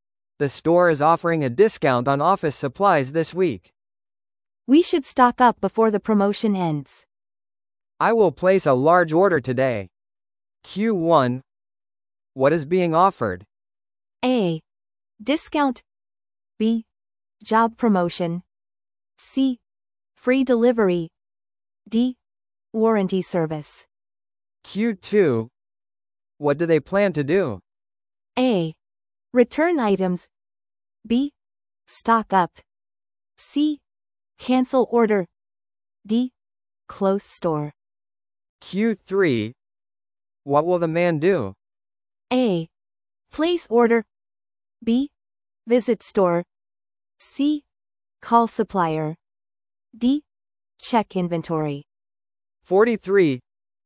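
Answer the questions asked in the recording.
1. A: Discount.
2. B: Stock up.
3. A: Place order.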